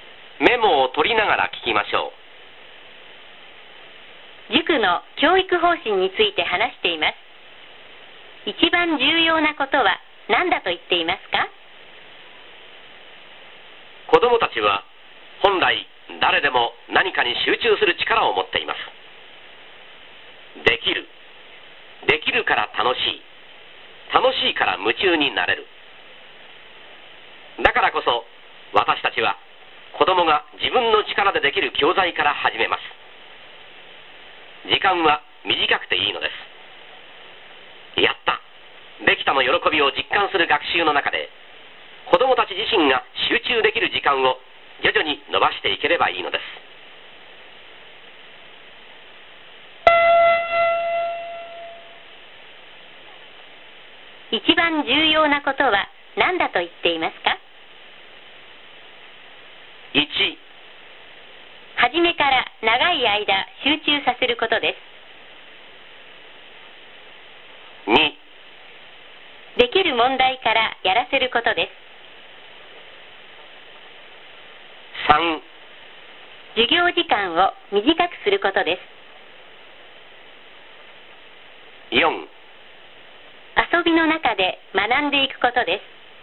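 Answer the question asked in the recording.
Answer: 2: できる問題からやらせることです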